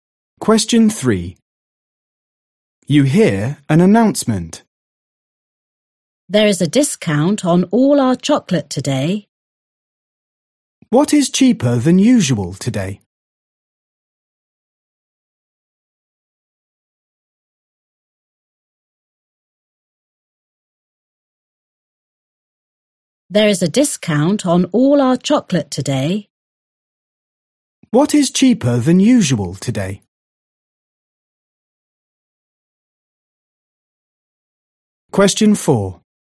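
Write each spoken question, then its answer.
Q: What is cheaper than usual today?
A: chocolate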